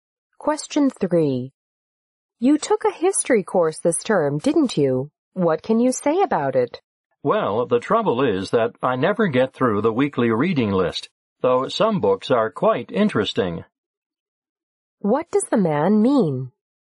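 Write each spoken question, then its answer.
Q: What does the man mean?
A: He can never finish the weekly reading list, which is too heavy.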